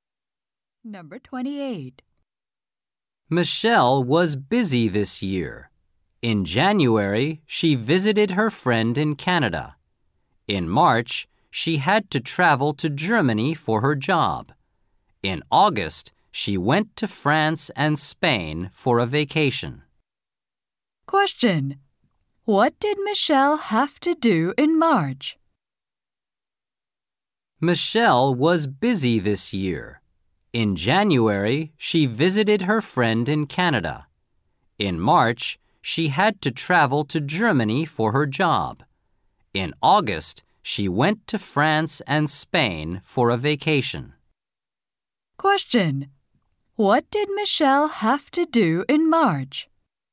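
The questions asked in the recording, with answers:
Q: What did Michelle have to do in March?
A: Travel to Germany for her job.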